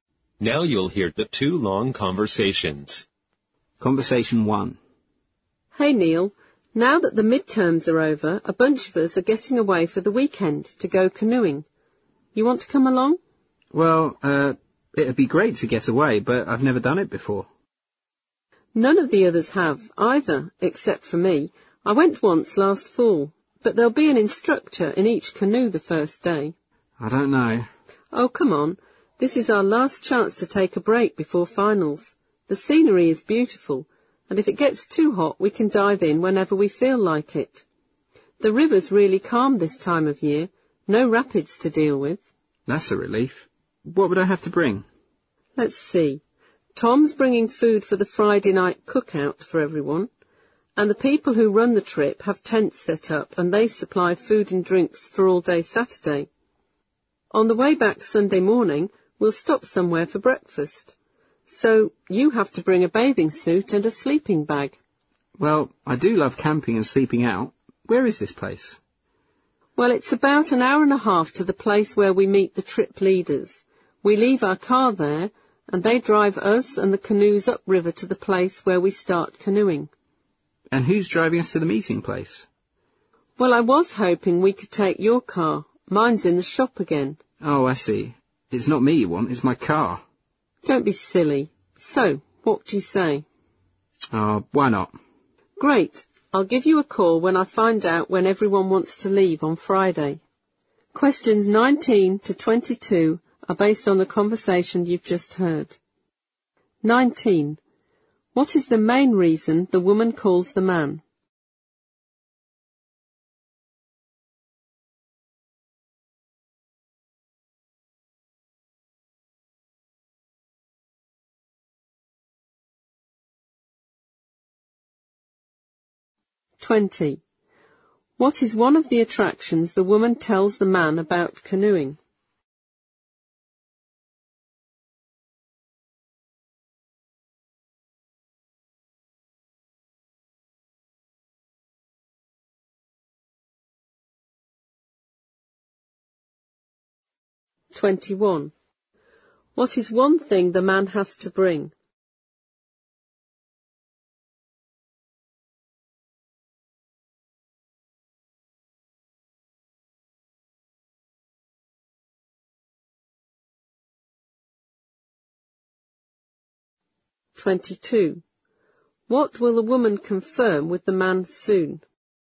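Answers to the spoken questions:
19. To invite him to go canoeing for the weekend
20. The beautiful scenery
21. A bathing suit (or a sleeping bag)
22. When everyone wants to leave on Friday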